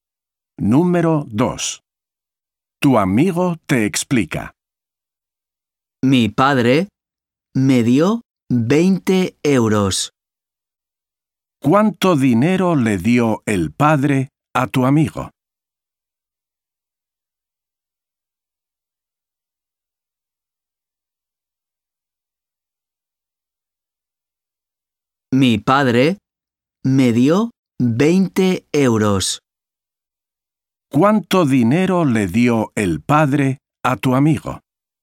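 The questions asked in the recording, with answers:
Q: ¿Cuánto dinero le dio el padre a tu amigo?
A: 20 euros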